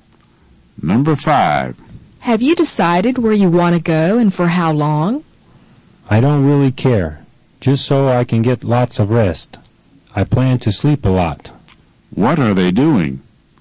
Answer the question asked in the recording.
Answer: They're planning a vacation.